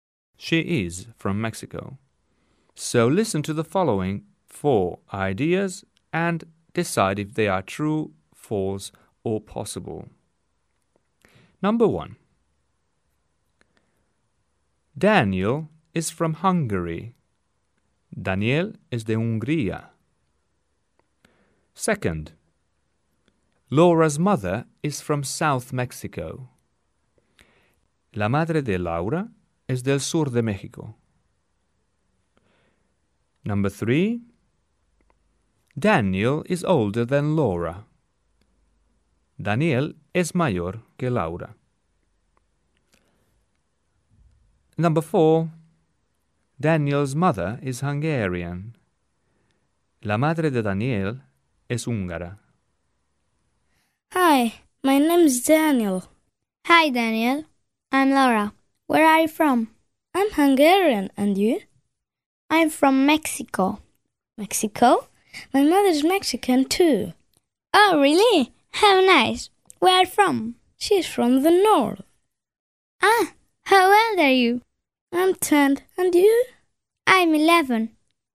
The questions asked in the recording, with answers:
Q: Daniel is from Hungary.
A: Daniel is from Hungary. Yes, this is true.

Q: Laura's mother is from South Mexico.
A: This is possible.

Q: Daniel is older than Laura.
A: This is false.

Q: Daniel's mother is Hungarian.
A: It's false.